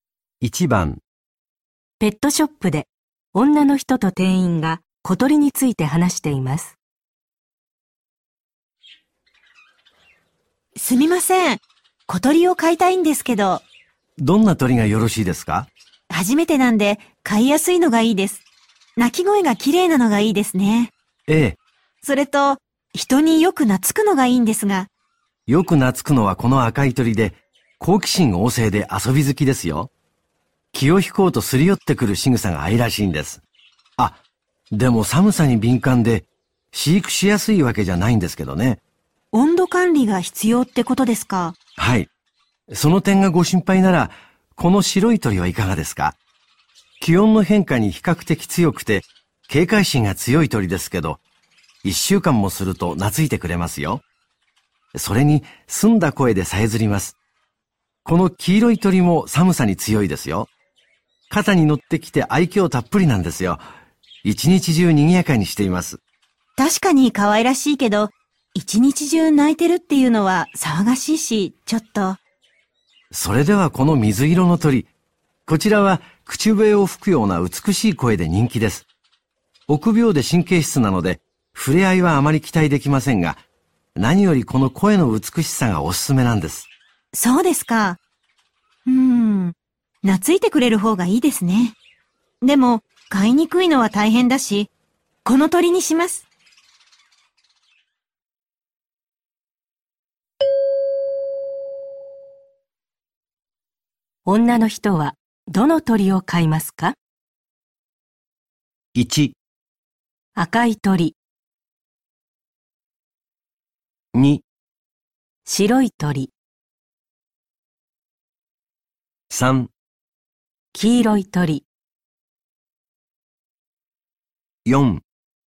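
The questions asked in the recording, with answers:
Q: 女の人は、どの鳥を飼いますか?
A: 2: 白い鳥。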